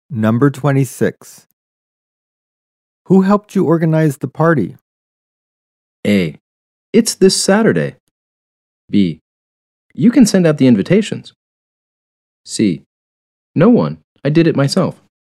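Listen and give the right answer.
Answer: C: No one. I did it myself.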